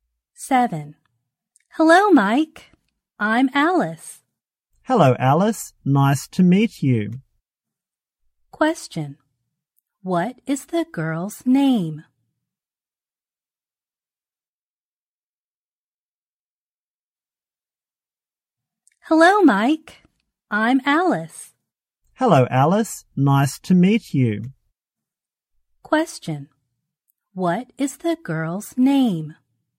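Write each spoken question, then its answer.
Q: What is the girl's name?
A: Alice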